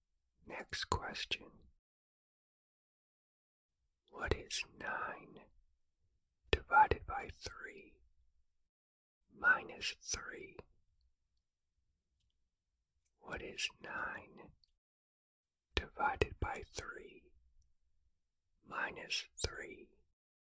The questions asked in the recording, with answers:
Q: What is 9 divided by 3 minus 3?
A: The answer is 0.